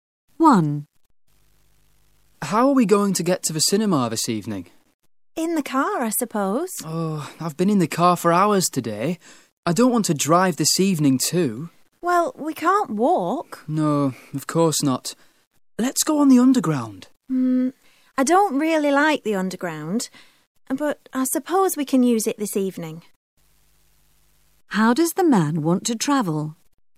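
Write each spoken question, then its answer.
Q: How does the man want to travel?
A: On the underground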